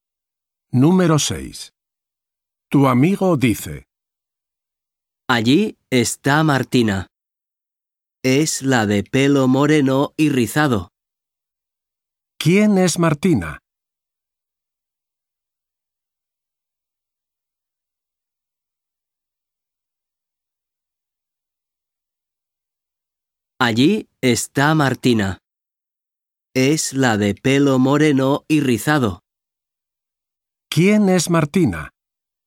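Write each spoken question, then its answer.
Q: ¿Quién es Martina?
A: la de pelo moreno y rizado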